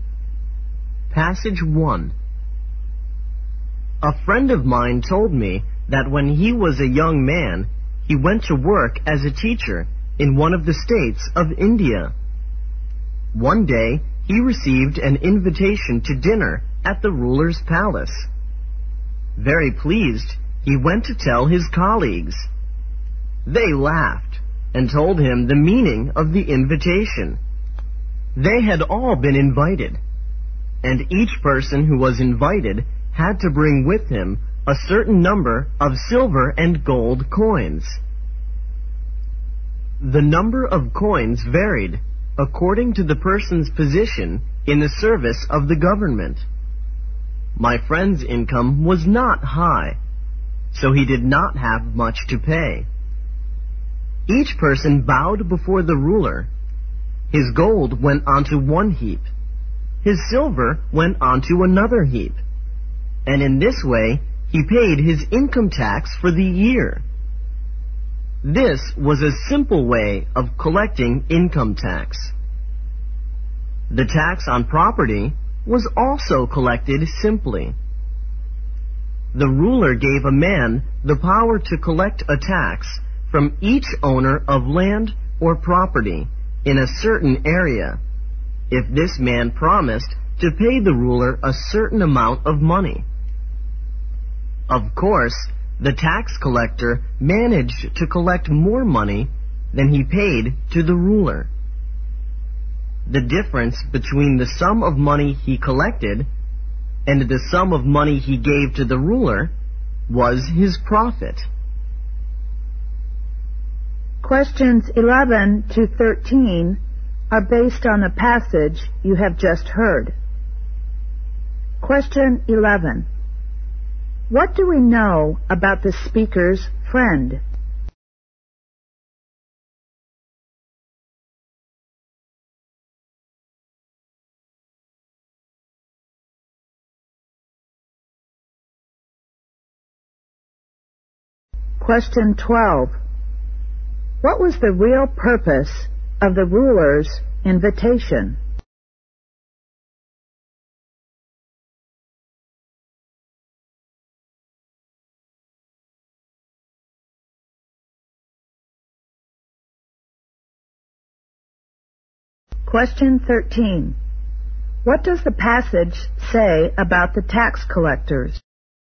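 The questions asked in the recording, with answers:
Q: What was the real purpose of the ruler's invitation?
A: To collect income tax

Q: What does the passage say about the tax collectors?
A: They collected more money than they paid the ruler and kept the difference as profit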